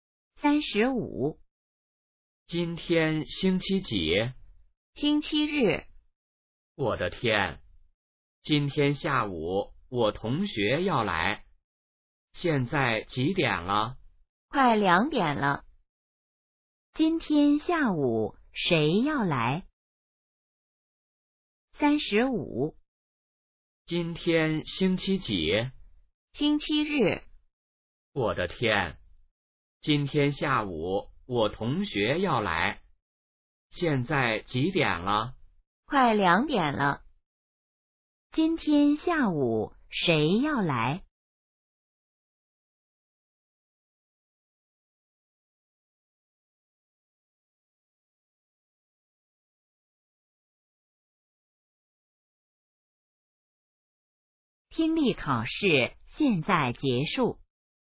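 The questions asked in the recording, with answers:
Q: 今天下午谁要来?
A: 同学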